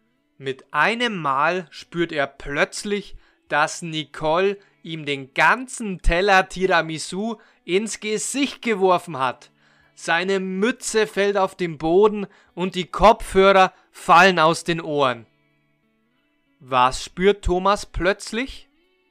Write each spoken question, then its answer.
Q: Was spürt Thomas plötzlich?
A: dass Nicole ihm den ganzen Teller Tiramisu ins Gesicht geworfen hat.